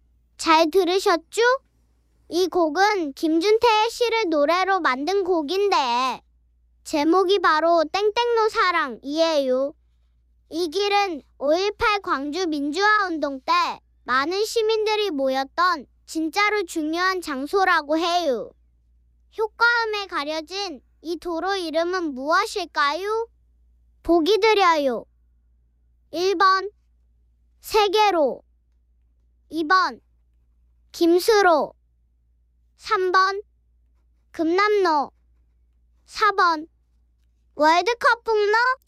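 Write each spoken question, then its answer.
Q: 효과음에 가려진 이 도로 이름은 무엇일까요?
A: 3번: 금남로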